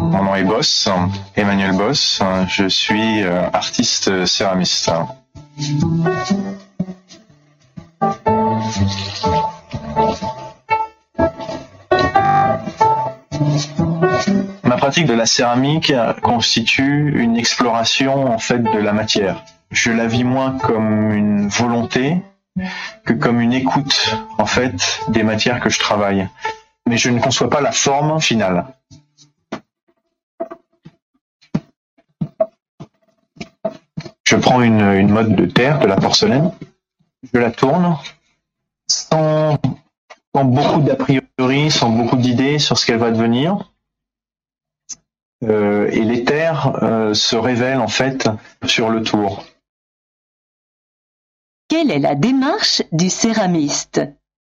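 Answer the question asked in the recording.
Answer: Une exploration de la matière : il tourne la terre sans idée préconçue et la forme se révèle sur le tour.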